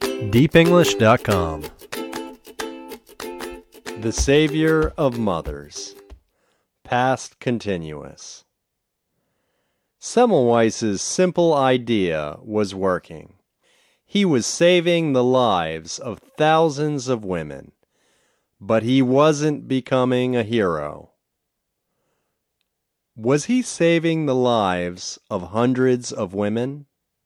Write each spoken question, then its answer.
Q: Was he saving the lives of hundreds of women?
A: No, he wasn't saving the life of hundreds of women.